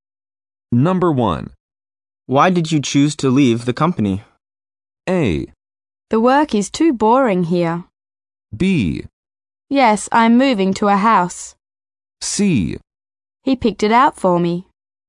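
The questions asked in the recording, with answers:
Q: Why did you choose to leave the company?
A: A: The work is too boring here.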